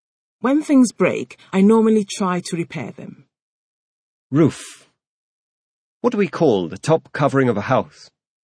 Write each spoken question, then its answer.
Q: What do we call the top covering of a house?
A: We call the top covering of a house the roof.